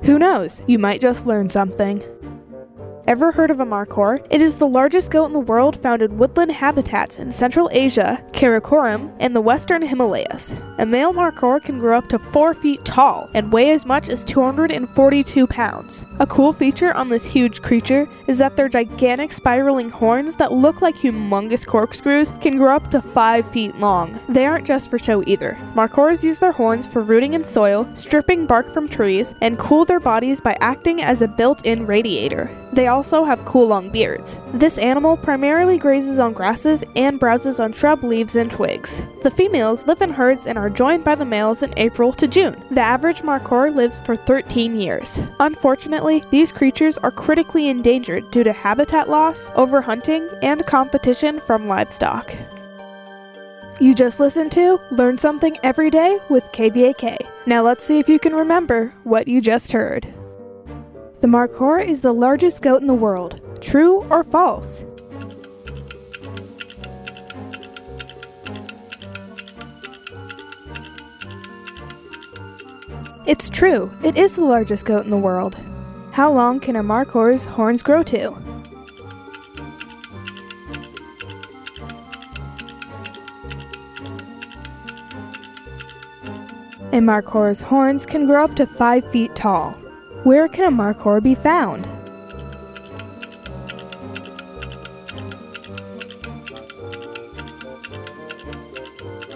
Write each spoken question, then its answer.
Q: The markhor is the largest goat in the world. True or false?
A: It's true. It is the largest goat in the world.

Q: Where can a markhor be found?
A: Markhors live in Central Asia, Karakoram, and the Western Himalayas.